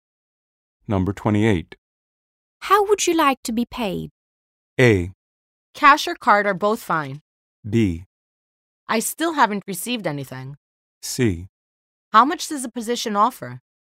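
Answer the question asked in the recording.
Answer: A: Cash or card are both fine.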